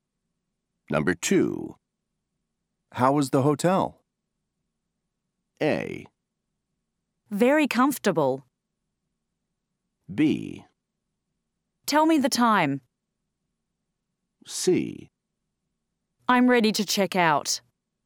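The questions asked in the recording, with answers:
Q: How was the hotel?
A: A: Very comfortable.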